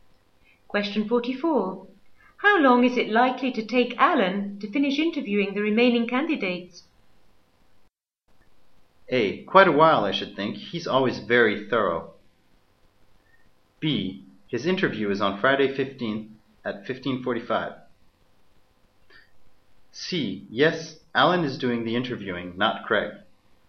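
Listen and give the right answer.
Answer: A: Quite a while, I should think. He's always very thorough.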